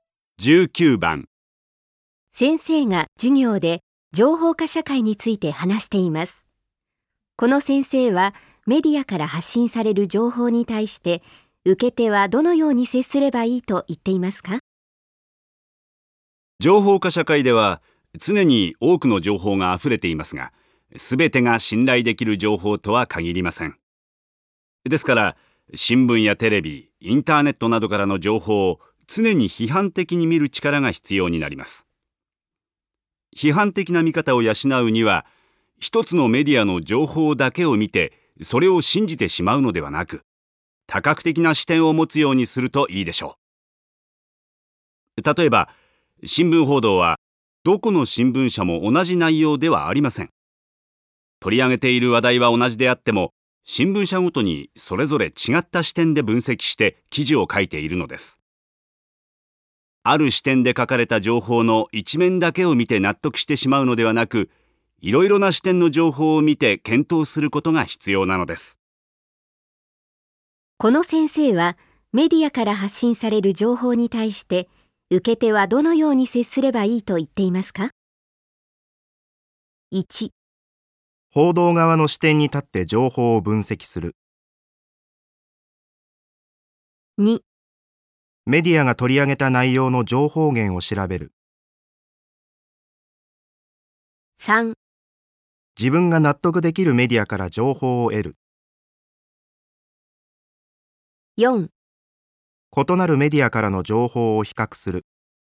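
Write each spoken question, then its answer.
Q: この先生はメディアから発信される情報に対して受け手はどのように接すればいいと言っていますか?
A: 4: 異なるメディアからの情報を比較する。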